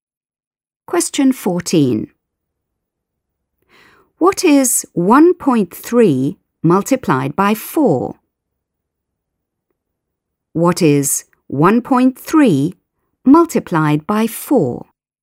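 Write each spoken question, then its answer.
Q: What is 1.3 multiplied by 4?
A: 5.2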